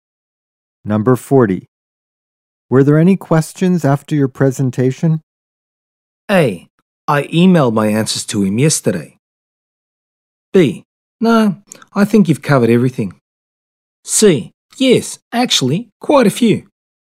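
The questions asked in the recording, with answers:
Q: Were there any questions after your presentation?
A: C: Yes, actually, quite a few.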